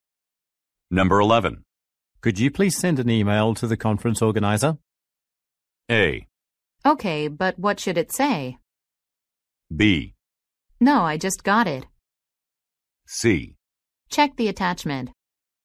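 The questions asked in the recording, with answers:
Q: Could you please send an email to the conference organizer?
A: A: Okay, but what should it say?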